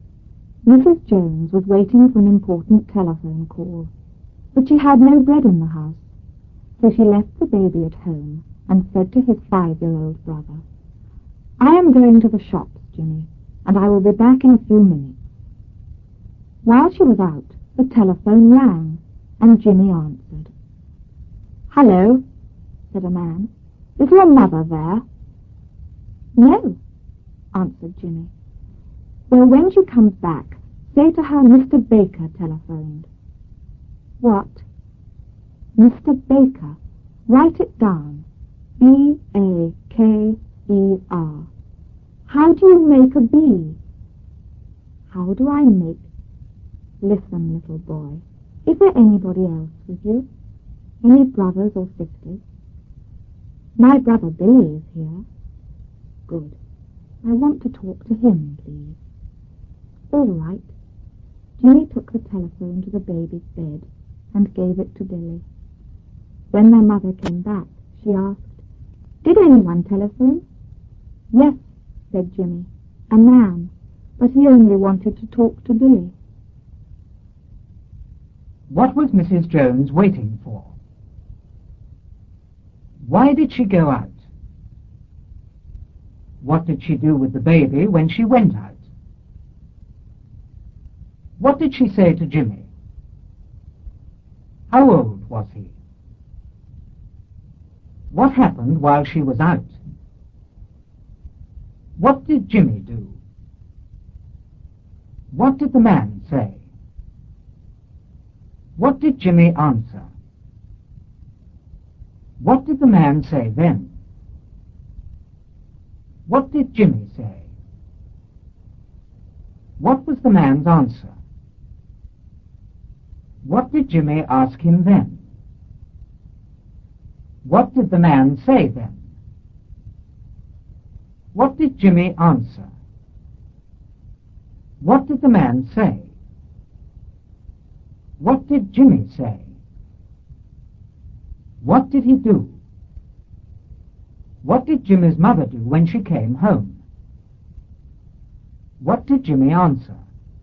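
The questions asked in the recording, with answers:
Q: What was Mrs. Jones waiting for?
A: An important telephone call

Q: Why did she go out?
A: She had no bread in the house

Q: What did she do with the baby when she went out?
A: She left him at home

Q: What did she say to Jimmy?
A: I am going to the shops, Jimmy, and I will be back in a few minutes.

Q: How old was he?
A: Five years old

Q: What happened while she was out?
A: The telephone rang

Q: What did Jimmy do?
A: He answered the telephone

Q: What did Jimmy's mother do when she came home?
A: She asked if anyone had telephoned

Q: What did Jimmy answer?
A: A man, but he only wanted to talk to Billy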